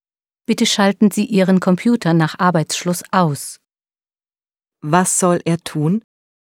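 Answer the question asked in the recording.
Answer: Den Computer nach Arbeitsschluss ausschalten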